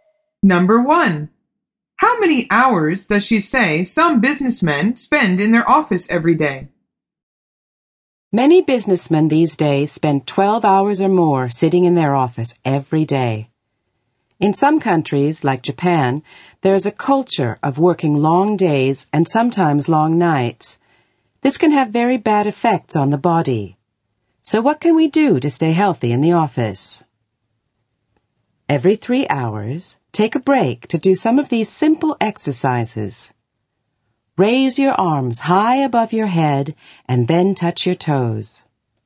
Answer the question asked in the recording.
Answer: The answer is 12 hours.